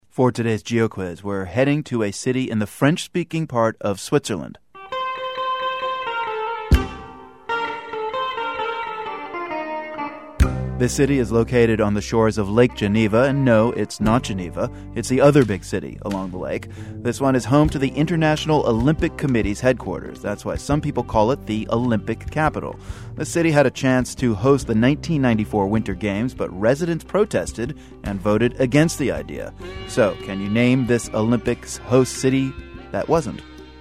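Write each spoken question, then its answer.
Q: So, can you name this Olympics host city that wasn't?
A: Lausanne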